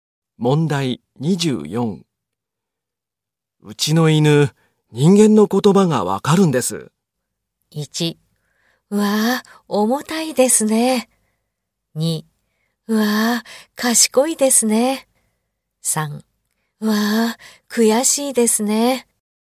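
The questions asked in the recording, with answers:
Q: うちの犬、人間の言葉がわかるんです。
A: 3: うわぁ、賢いですね。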